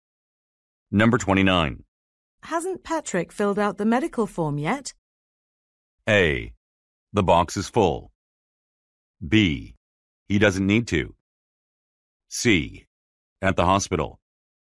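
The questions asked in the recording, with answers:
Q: Hasn't Patrick filled out the medical form yet?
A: B: He doesn't need to.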